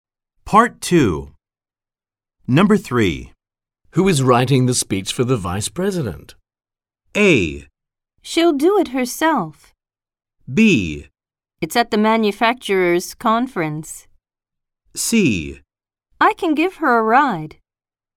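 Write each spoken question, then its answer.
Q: Who is writing the speech for the Vice President?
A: A: She'll do it herself.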